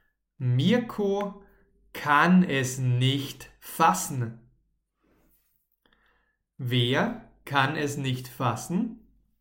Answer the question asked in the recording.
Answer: Mirko. Mirko kann es nicht fassen.